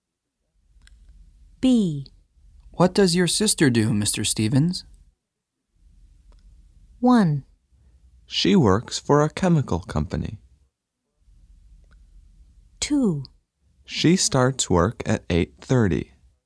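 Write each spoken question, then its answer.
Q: What does your sister do, Mr. Stevens?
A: 1: She works for a chemical company.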